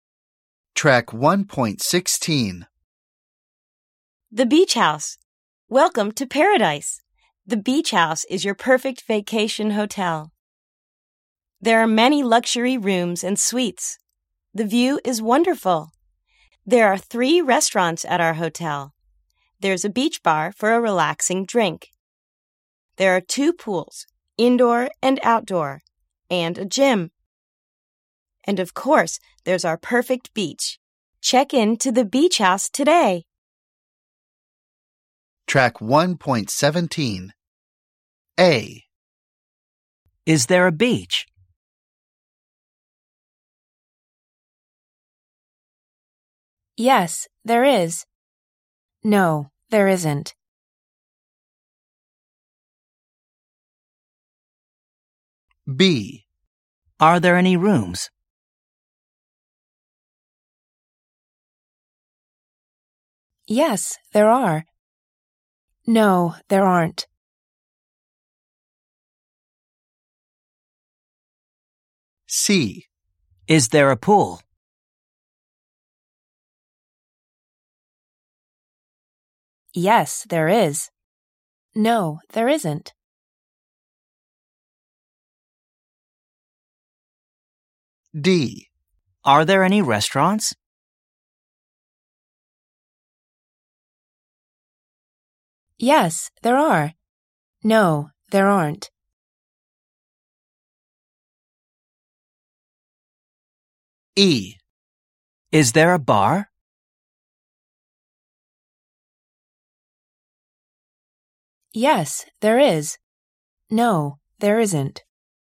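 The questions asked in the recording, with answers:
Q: Is there a beach?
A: Yes, there is.

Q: Are there any rooms?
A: Yes, there are.

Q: Is there a pool?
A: Yes, there is.

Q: Are there any restaurants?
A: Yes, there are.

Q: Is there a bar?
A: Yes, there is.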